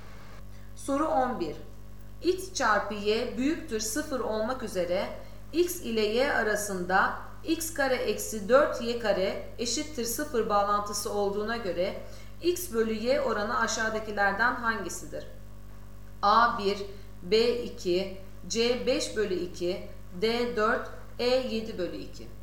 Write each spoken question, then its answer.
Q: X çarpı Y büyüktür 0 olmak üzere X ile Y arasında x kare eksi 4 y kare eşittir 0 bağlantısı olduğuna göre x bölü y oranı aşağıdakilerden hangisidir?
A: Doğru cevap B 2.